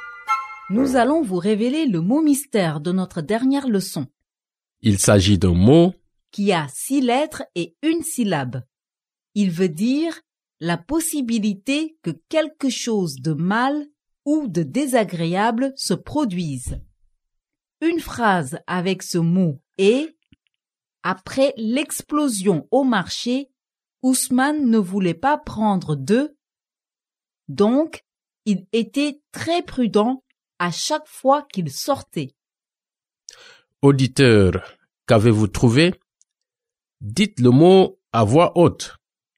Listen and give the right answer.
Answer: Le mot mystère d'aujourd'hui est risque.